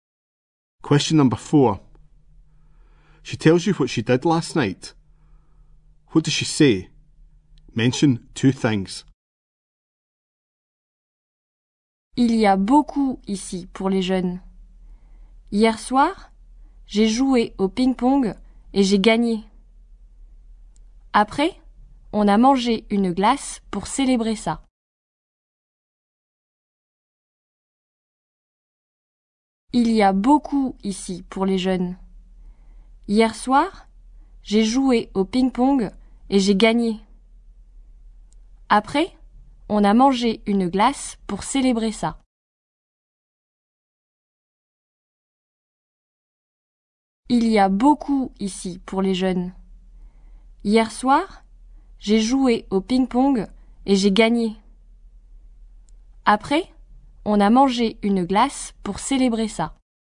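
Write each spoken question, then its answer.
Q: She tells you what she did last night. What does she say? Mention two things.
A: She played table tennis and won; afterwards they ate an ice cream to celebrate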